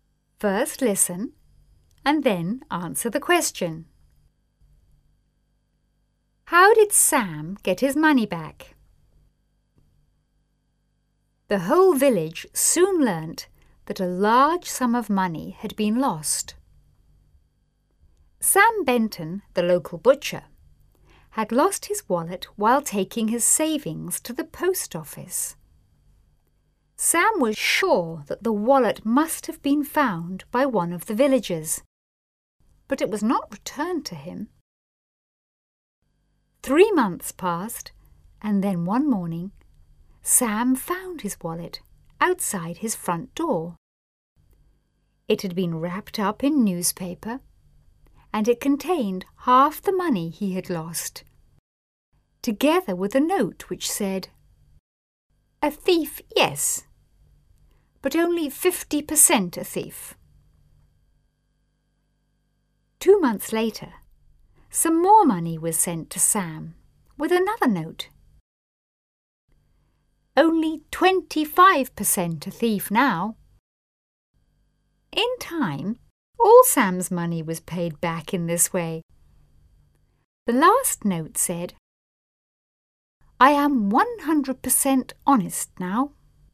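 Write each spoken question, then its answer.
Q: How did Sam get his money back?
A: The thief returned it in instalments, left with notes (half first, then more later, until all was paid back).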